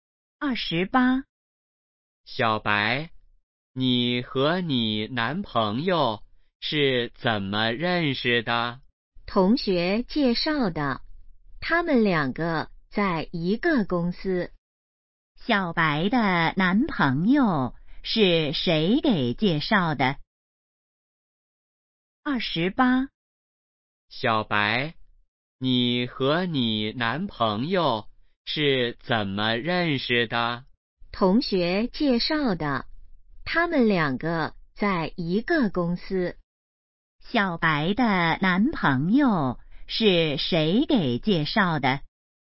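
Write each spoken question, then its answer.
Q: 小白的男朋友是谁给介绍的?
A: 同学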